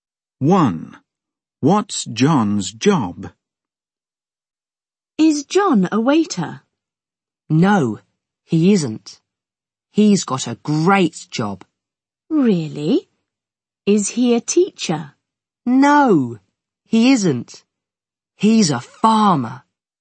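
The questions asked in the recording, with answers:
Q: What's John's job?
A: He's a farmer.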